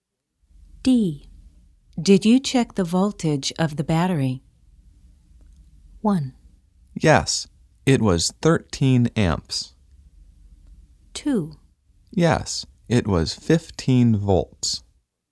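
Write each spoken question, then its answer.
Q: Did you check the voltage of the battery?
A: 2: Yes, it was 15 volts.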